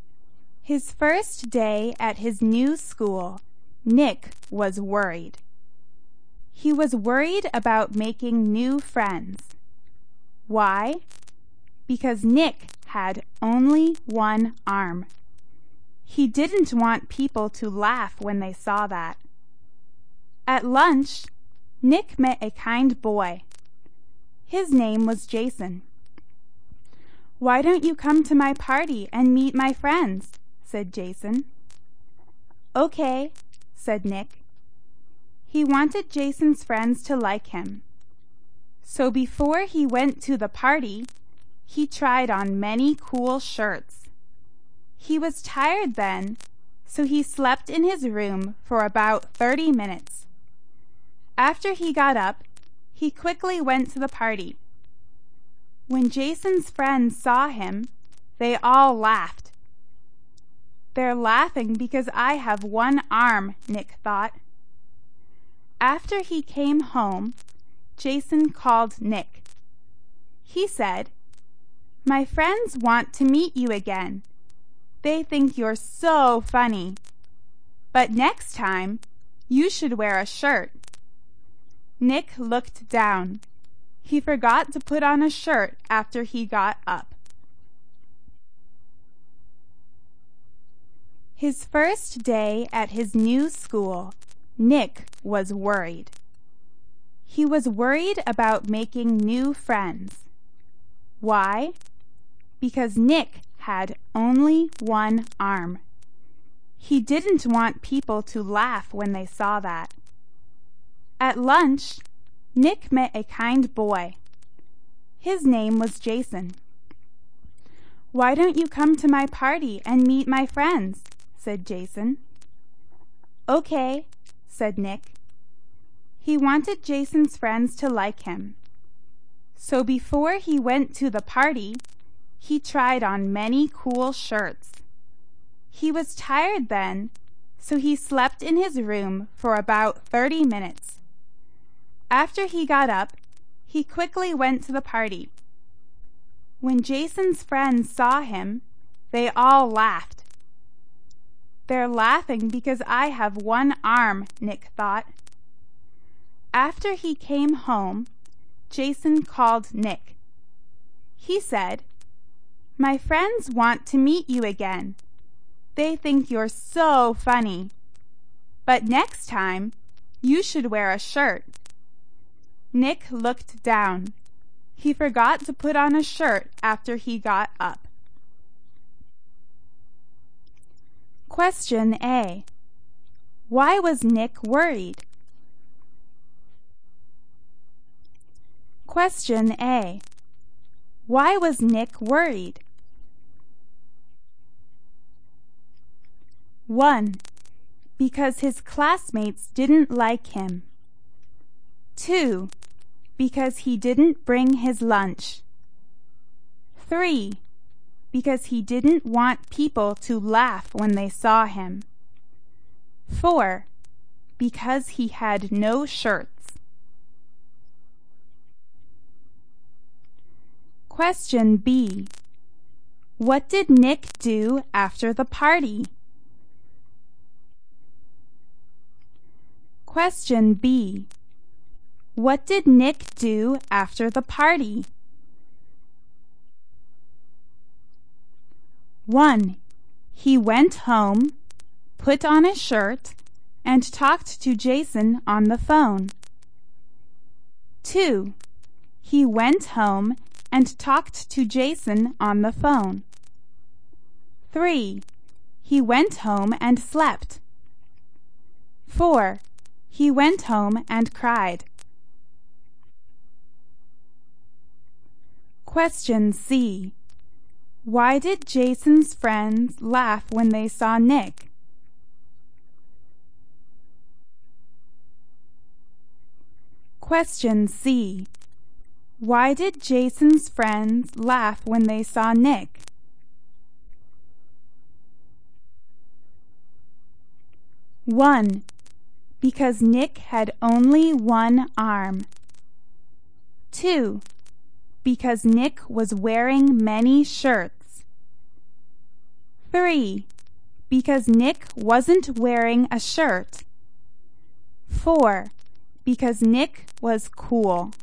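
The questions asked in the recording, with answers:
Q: Why was Nick worried?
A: 3: Because he didn't want people to laugh when they saw him.

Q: What did Nick do after the party?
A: 2: He went home and talked to Jason on the phone.

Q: Why did Jason's friends laugh when they saw Nick?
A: 3: because Nick wasn't wearing a shirt.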